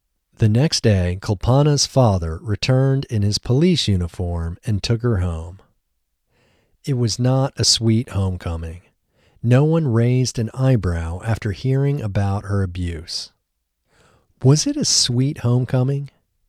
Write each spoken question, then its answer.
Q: Was it a sweet homecoming?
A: No, it wasn't a sweet homecoming.